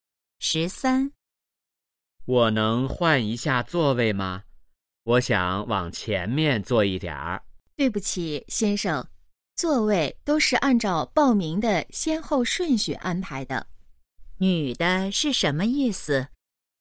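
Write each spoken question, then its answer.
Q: 女的是什么意思?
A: 不能换座位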